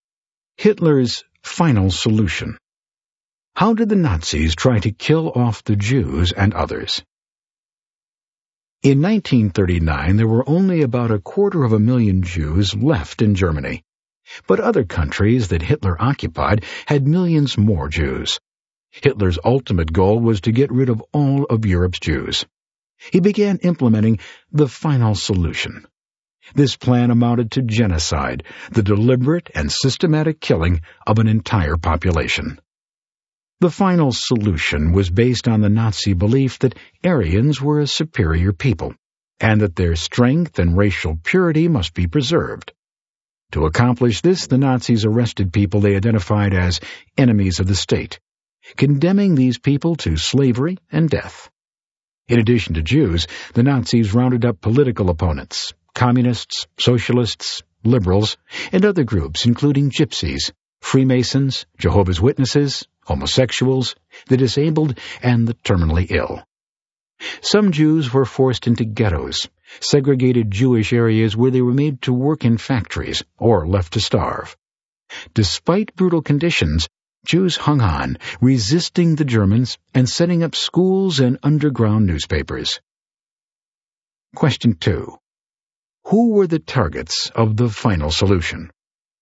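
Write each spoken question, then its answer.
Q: Who were the targets of the final solution?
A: Jews, and also political opponents, communists, socialists, liberals, Gypsies, Freemasons, Jehovah's Witnesses, homosexuals, the disabled and the terminally ill.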